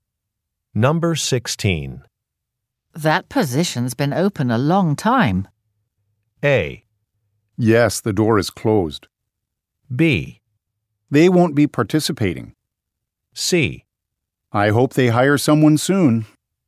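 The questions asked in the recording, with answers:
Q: That position's been open a long time.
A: C: I hope they hire someone soon.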